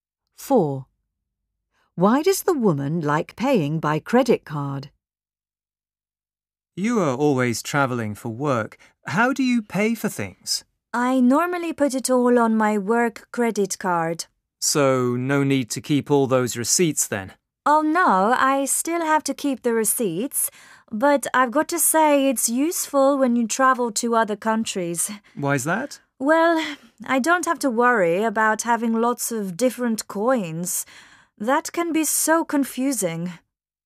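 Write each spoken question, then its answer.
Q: Why does the woman like paying by credit card?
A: She doesn't have to worry about different coins when travelling abroad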